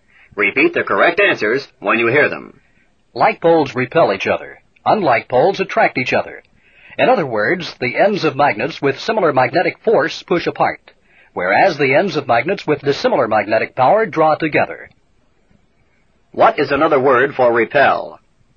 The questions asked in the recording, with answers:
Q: What is another word for repel?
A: Push apart.